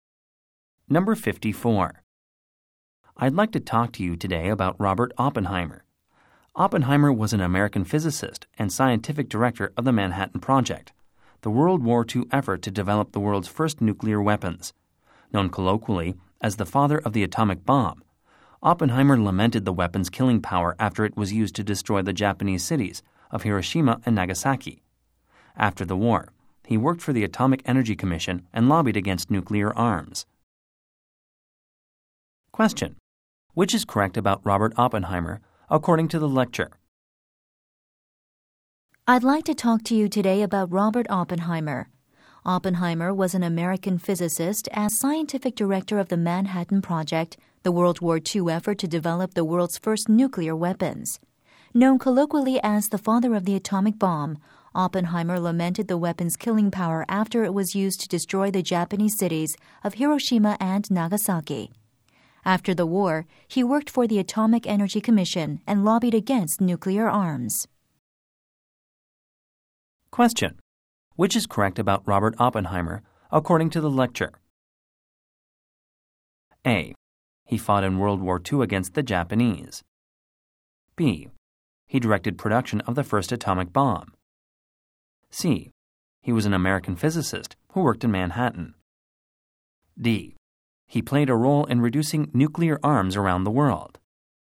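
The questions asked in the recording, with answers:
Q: Which is correct about Robert Oppenheimer, according to the lecture?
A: B: He directed production of the first atomic bomb.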